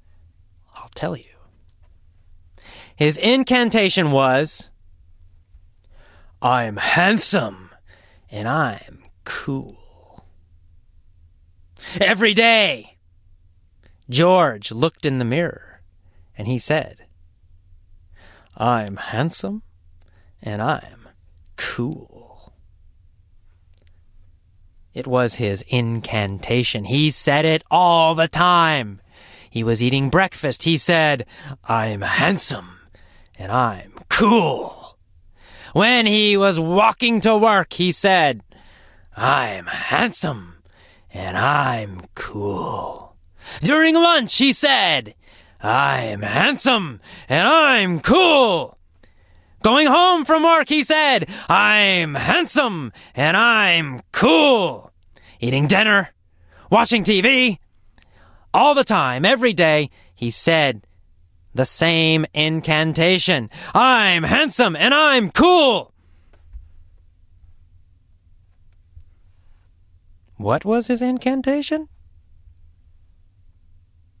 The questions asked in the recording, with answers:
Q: What was his incantation?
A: His incantation was, "I'm handsome and I'm cool!"